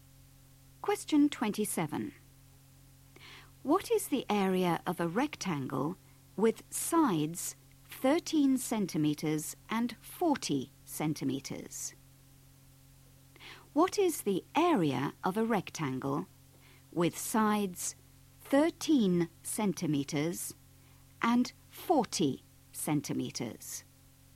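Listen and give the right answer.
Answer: 520 square centimetres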